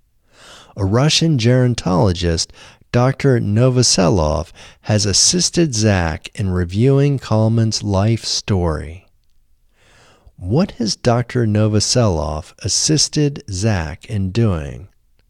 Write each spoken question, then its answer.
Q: What has Dr. Novoselov assisted Zak in doing?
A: Dr. Novoselov has assisted Zak in reviewing Kalman's life story.